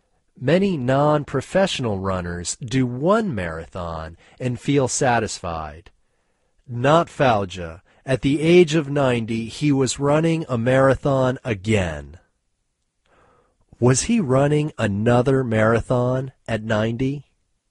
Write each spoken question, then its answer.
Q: Was he running another marathon at 90?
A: Yes, he was running another marathon at 90.